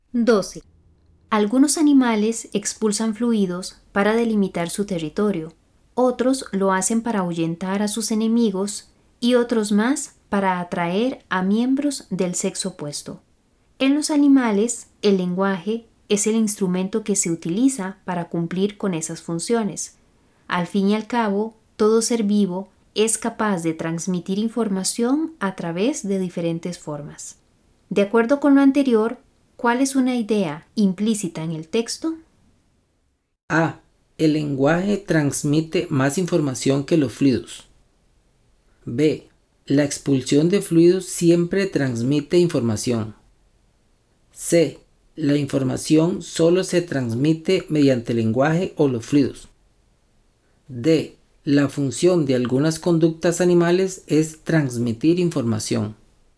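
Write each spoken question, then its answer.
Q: De acuerdo con lo anterior, ¿cuál es una idea implícita en el texto?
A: D: La función de algunas conductas animales es transmitir información.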